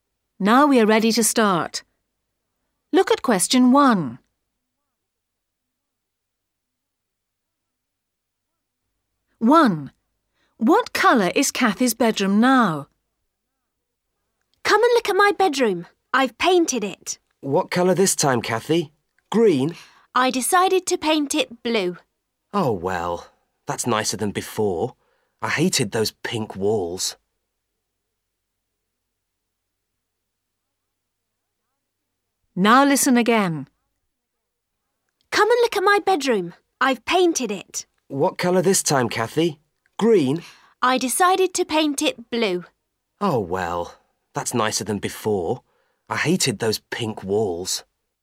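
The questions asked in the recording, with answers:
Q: What colour is Kathy's bedroom now?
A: Blue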